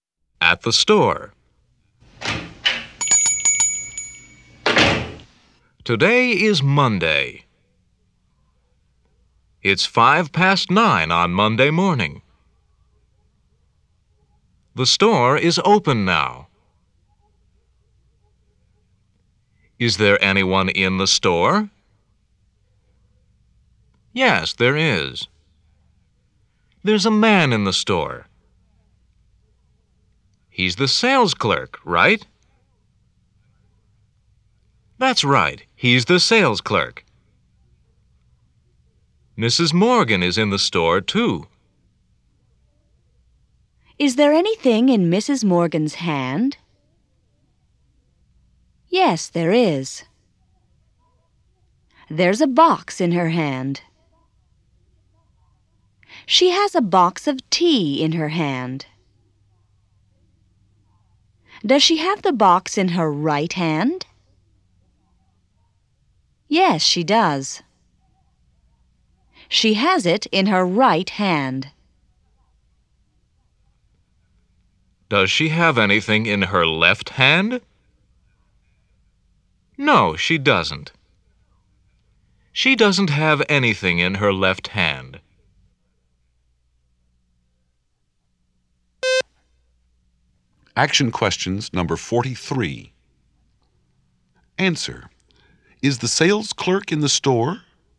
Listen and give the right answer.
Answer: Yes, he is.